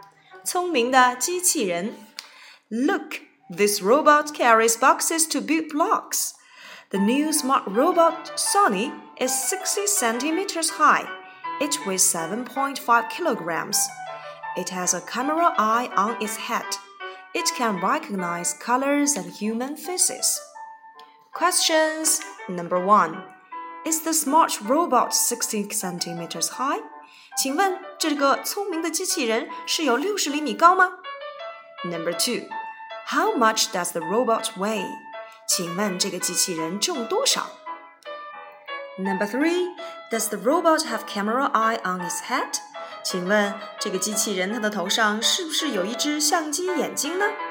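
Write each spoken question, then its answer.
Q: Is the smart robot 60 centimeters high?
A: Yes, it is.

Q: How much does the robot weigh?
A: 7.5 kilograms

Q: does the robot have camera eye on its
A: Yes, it does.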